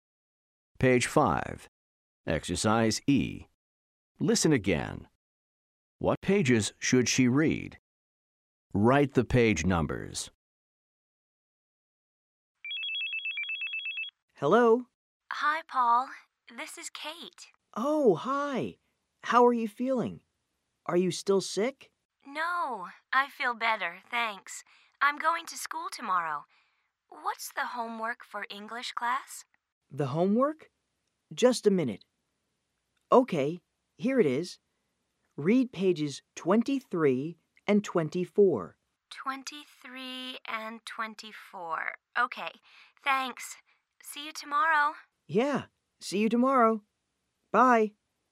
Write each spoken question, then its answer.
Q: What pages should she read?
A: The answer is 23 and 24. Pages 23 and 24.